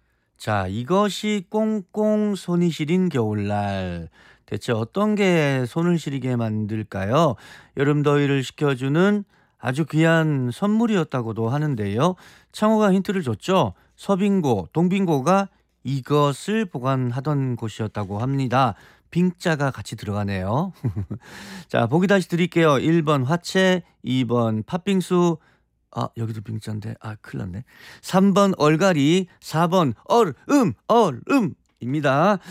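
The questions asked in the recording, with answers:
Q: 대체 어떤 게 손을 시리게 만들까요?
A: 4: 얼음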